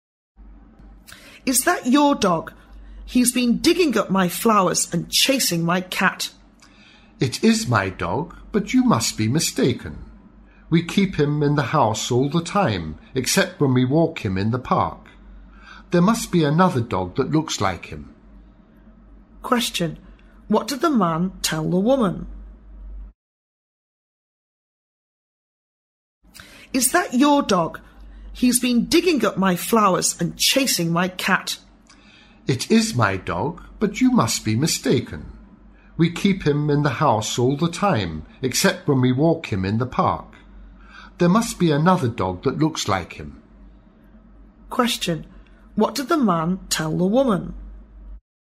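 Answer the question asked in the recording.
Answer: It must be another dog that looks like his; his dog is kept in the house

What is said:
A B C D B [听力原文] W: Is that your dog? He's been digging up my flowers and chasing my cat. M: It is my dog, but you must be mistaken. We keep him in the house all the time, except when we walk him in the park. There must be another dog that looks like him. Q: What did the man tell the woman?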